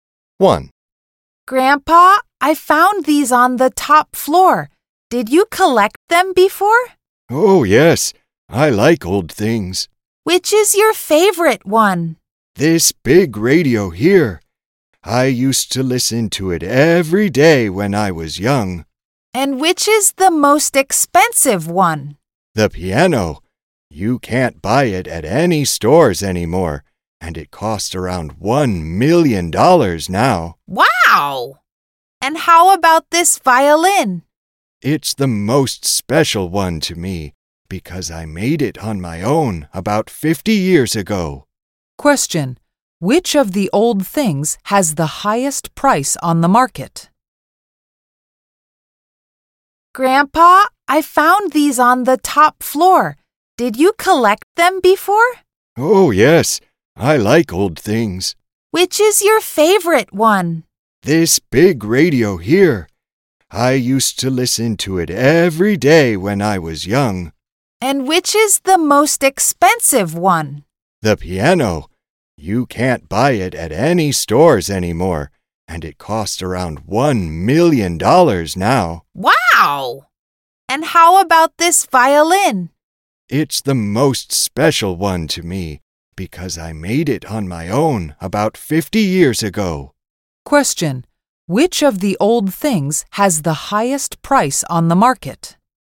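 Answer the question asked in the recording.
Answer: The piano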